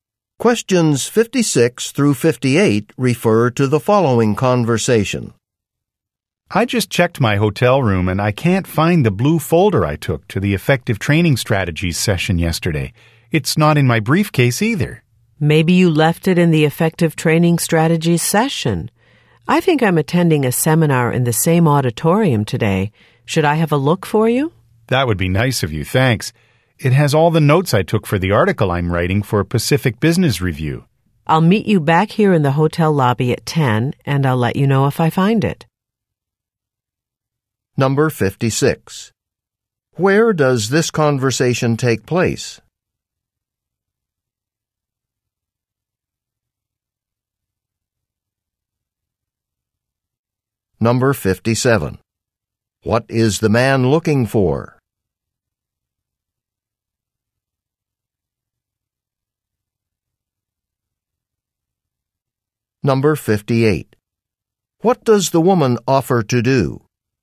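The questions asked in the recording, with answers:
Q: Where does this conversation take place?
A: In a hotel

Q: What is the man looking for?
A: A blue folder

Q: What does the woman offer to do?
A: Look for the folder in the auditorium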